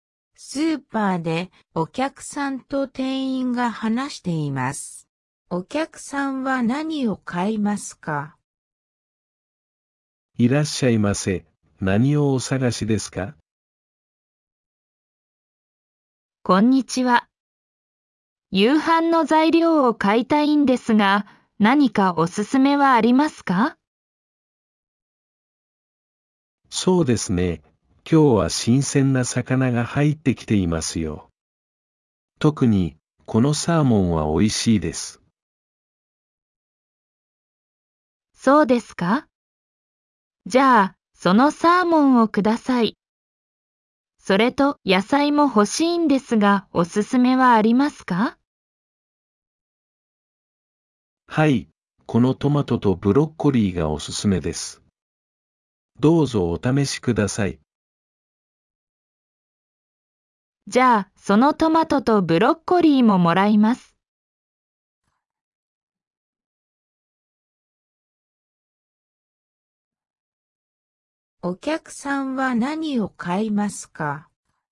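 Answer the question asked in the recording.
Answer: サーモンとトマトとブロッコリー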